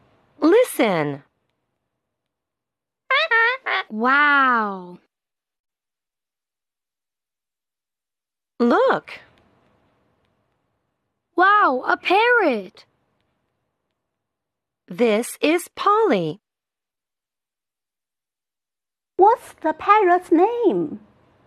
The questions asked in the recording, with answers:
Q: What's the parrot's name?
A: The parrot's name is Polly.